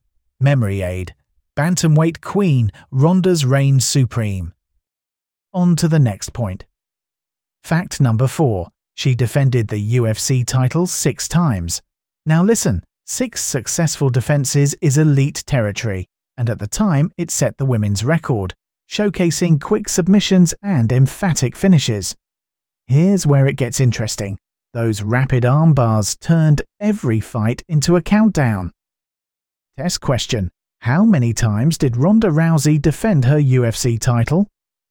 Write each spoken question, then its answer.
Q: How many times did Ronda Rousey defend her UFC title?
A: Correct answer, 6.